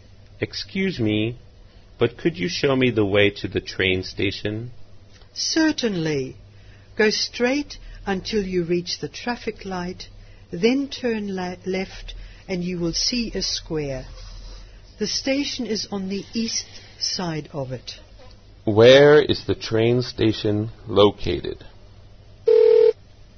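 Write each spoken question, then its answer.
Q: Where is the train station located?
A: On the east side of the square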